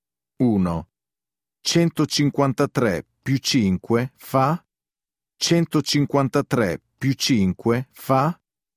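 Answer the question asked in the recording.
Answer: 158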